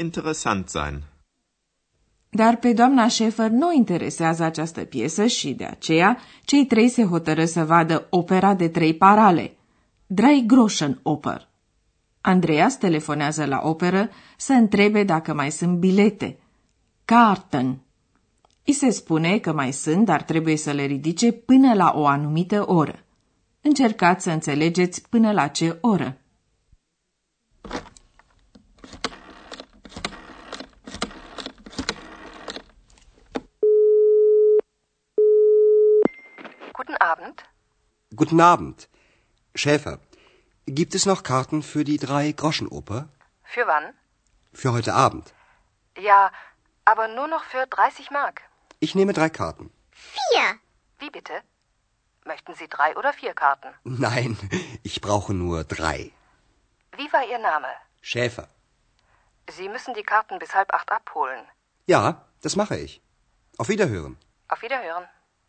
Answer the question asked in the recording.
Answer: Așadar, Andreas trebuie să ridice biletele până la șapte și jumătate.